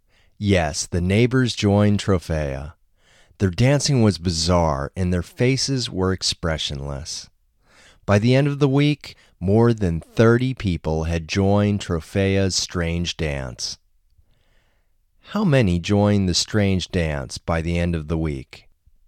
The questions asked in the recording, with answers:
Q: How many joined the strange dance by the end of the week?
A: By the end of the week, more than 30 people had joined the strange dance.